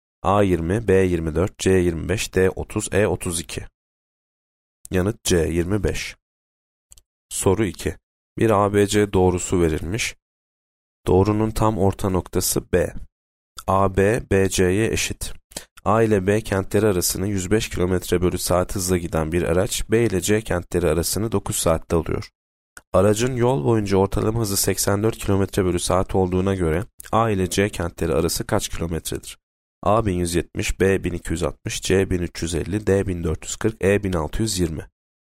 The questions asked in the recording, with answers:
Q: Aracın yol boyunca ortalama hızı 84 km bölü saat olduğuna göre, A ile C kentleri arası kaç kilometredir?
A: Yanıt B 1260.